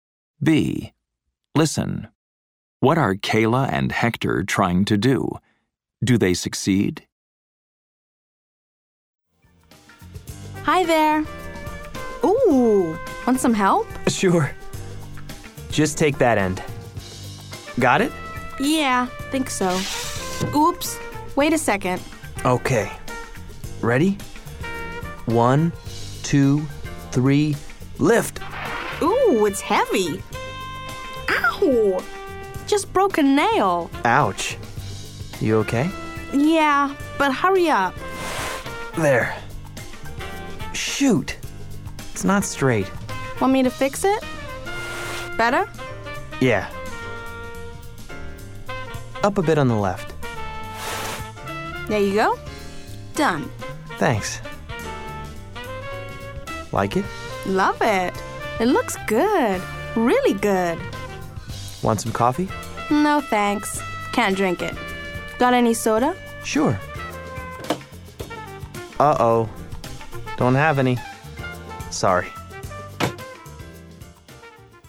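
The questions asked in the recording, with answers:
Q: Do they succeed?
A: Yes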